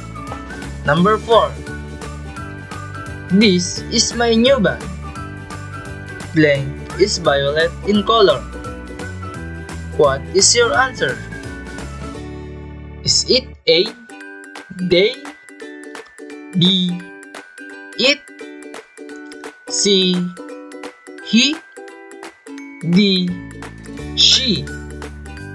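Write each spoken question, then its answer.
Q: This is my new bag. Blank is violet in color. What is your answer?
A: B: It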